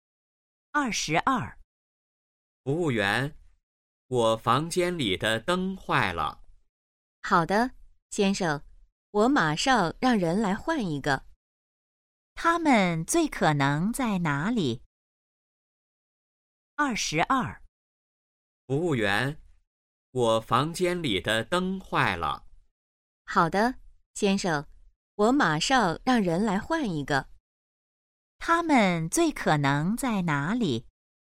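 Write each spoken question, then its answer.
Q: 他们最可能在哪里?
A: 宾馆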